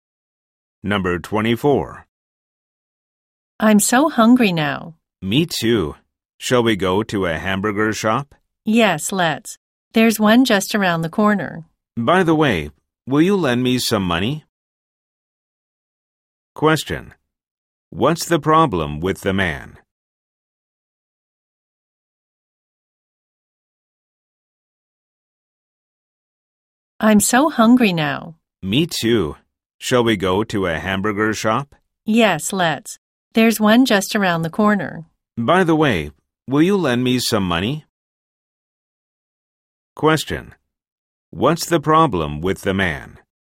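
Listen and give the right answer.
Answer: He doesn't have money, so he needs to borrow some.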